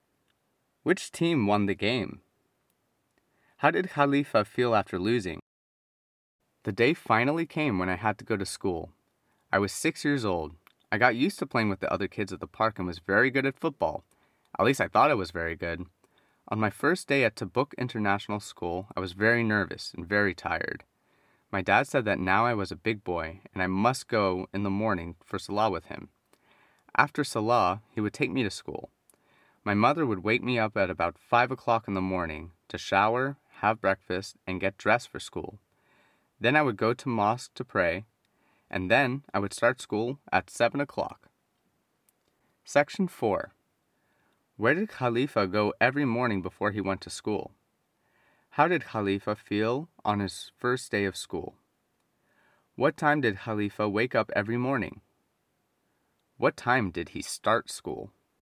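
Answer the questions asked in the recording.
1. To the mosque to pray
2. Very nervous and very tired
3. About 5 o'clock
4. 7 o'clock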